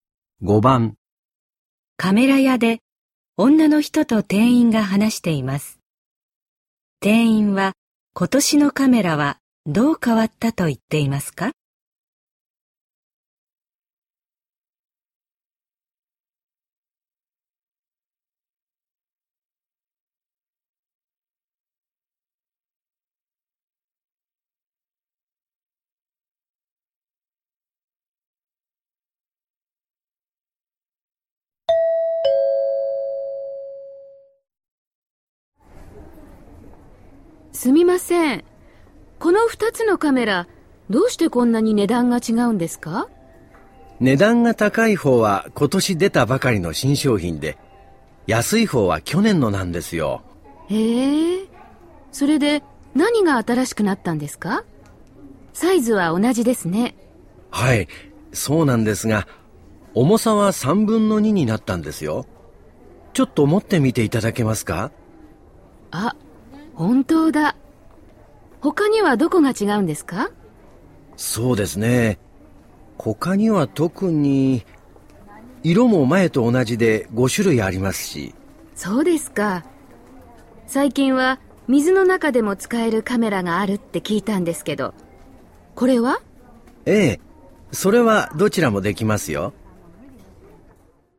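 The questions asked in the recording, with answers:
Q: 店員は、今年のカメラはどう変わったと言っていますか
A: 軽くなった(重さが3分の2になった)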